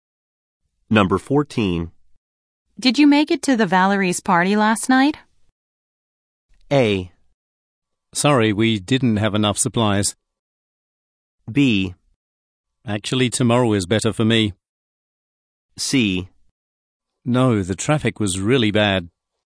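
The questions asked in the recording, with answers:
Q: Did you make it to the Valerie's party last night?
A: C: No, the traffic was really bad.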